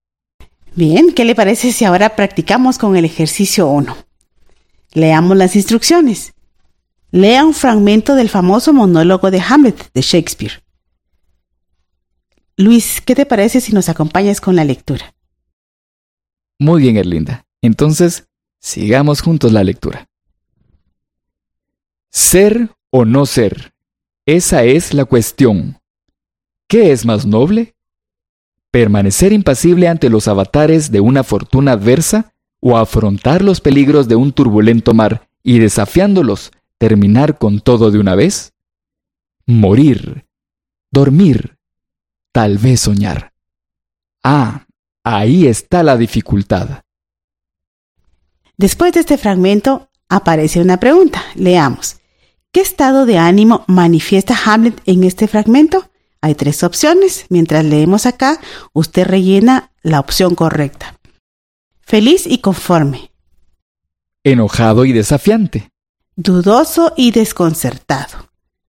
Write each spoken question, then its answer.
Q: ¿Qué estado de ánimo manifiesta Hamlet en este fragmento?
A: Ah, muy bien, dudoso y desconcertado.